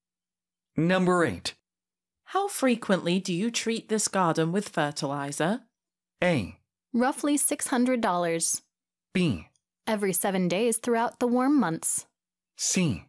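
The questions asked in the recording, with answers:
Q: How frequently do you treat this garden with fertilizer?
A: B: Every 7 days throughout the warm months.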